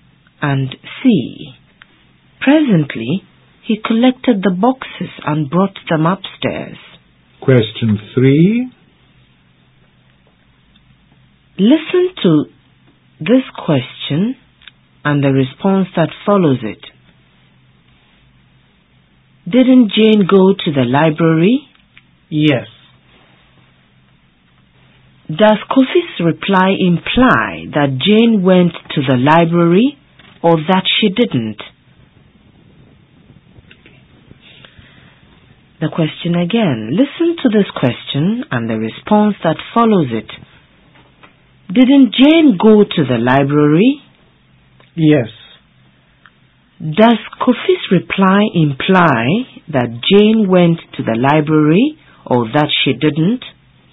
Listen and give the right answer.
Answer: The sentence implies Jane went to the library.